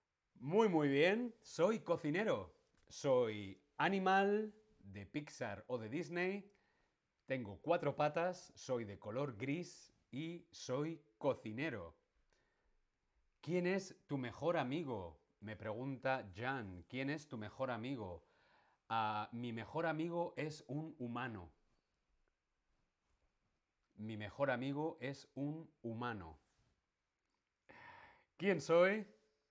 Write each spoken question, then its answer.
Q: ¿Quién soy?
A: Me llamo Remy y soy Ratatouille.